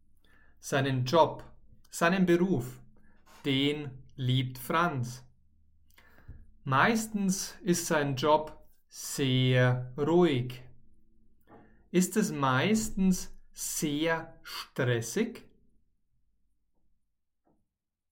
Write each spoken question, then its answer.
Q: Ist es meistens sehr stressig?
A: Nein, es ist meistens nicht sehr stressig.